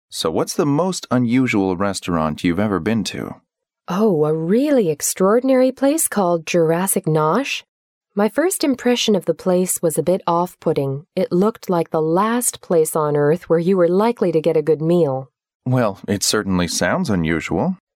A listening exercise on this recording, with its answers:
What does the woman think of the restaurant?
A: It was the worst place for a meal.

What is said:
M: So, what's the most unusual restaurant you've ever been to?
W: Oh, a really extraordinary place called Jurassic Noah. My first impression of the place was a bit of off-putting. It looked like the last place on earth where you were likely to get a good meal.
M: Well, it certainly sounds unusual!